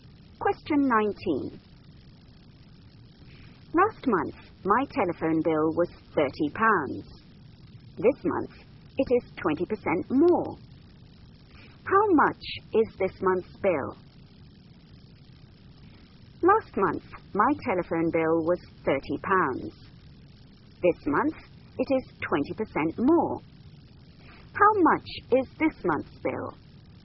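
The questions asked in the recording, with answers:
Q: How much is this month's bill?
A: £36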